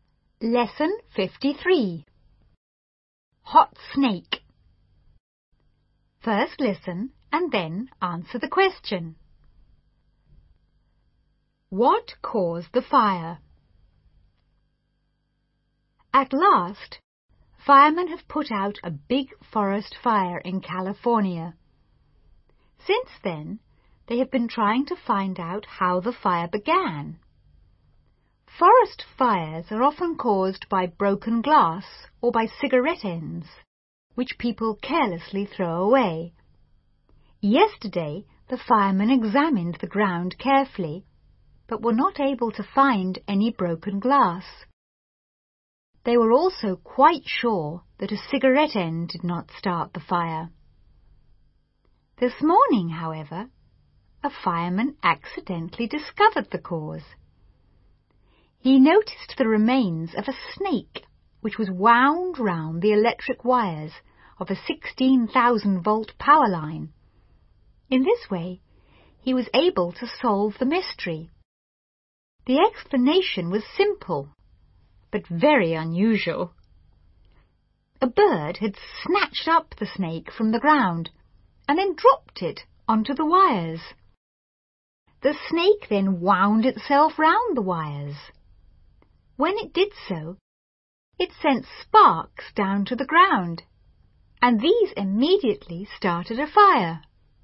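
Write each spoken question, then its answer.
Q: What caused the fire?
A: A snake dropped by a bird onto electric power wires, which sent sparks to the ground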